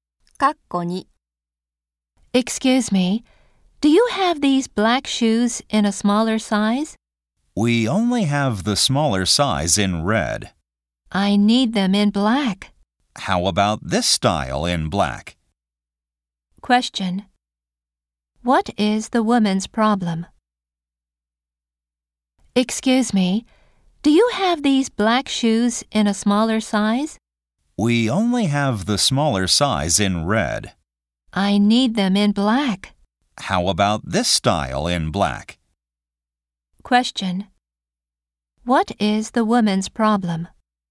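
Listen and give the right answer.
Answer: The smaller size of the shoes isn't available in black.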